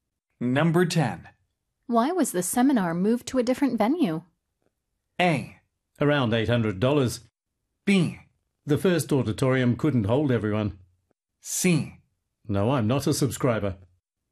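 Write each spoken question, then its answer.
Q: Why was the seminar moved to a different venue?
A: B: The first auditorium couldn't hold everyone.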